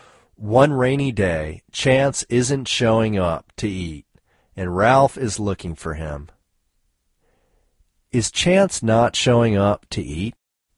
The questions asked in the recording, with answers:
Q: Is Chance not showing up to eat?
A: Yes, Chance isn't showing up to eat.